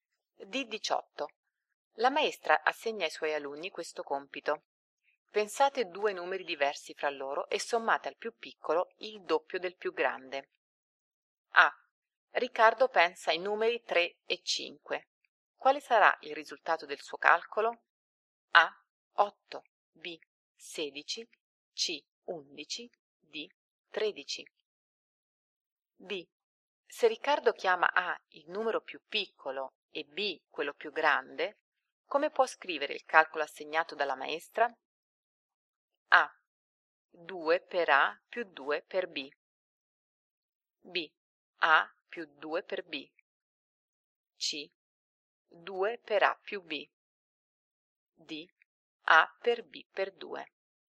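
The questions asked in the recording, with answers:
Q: Quale sarà il risultato del suo calcolo?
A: D: 13

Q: Se Riccardo chiama A il numero più piccolo e B quello più grande, come può scrivere il calcolo assegnato dalla maestra?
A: B: A più 2 per B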